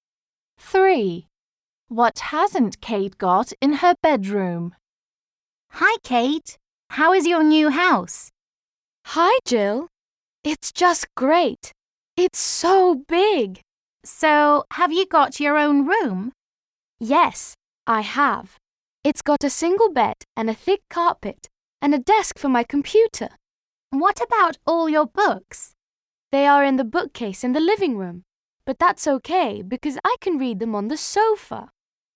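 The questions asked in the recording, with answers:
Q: What hasn't Kate got in her bedroom?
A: A bookcase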